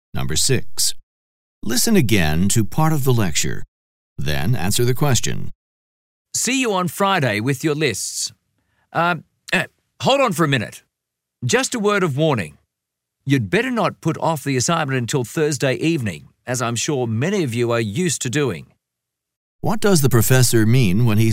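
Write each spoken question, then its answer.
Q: What does the professor mean when he says this?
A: He is warning students to start the assignment early and not leave it until Thursday evening.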